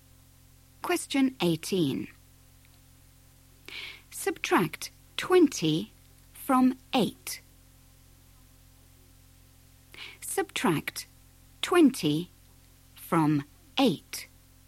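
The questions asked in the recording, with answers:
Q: Subtract 20 from 8.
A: -12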